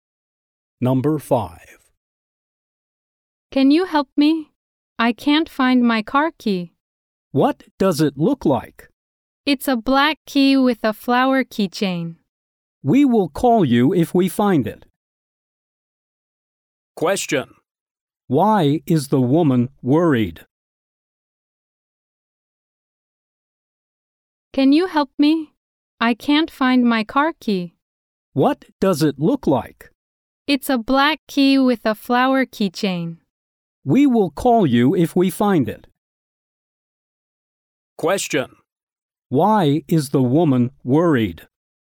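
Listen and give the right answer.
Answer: She can't find her car key.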